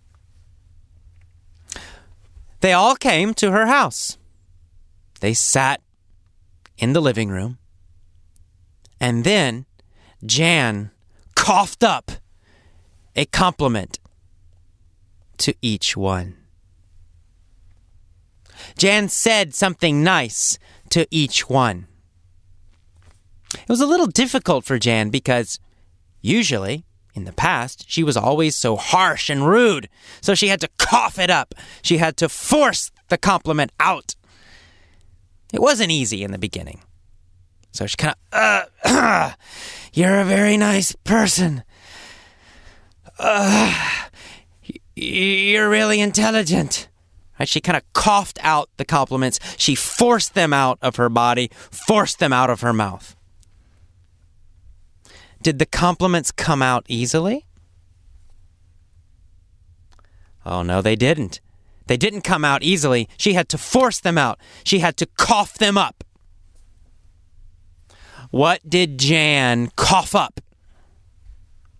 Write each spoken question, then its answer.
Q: What did Jan cough up?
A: Compliments.